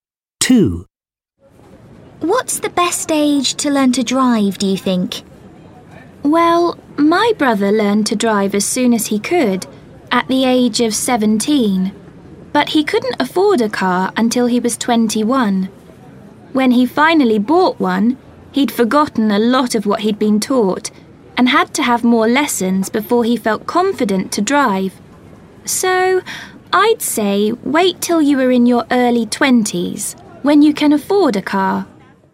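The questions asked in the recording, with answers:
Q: What's the best age to learn to drive, do you think?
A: In your early 20s, when you can afford a car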